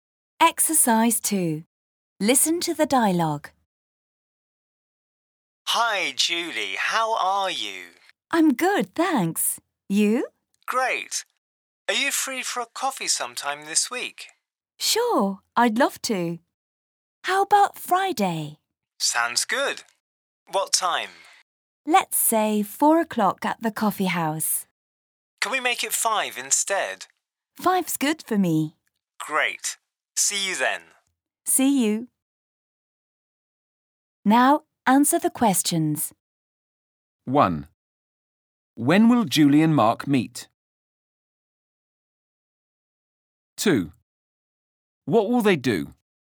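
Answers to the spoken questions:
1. On Friday at 5 o'clock
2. Have a coffee at the coffee house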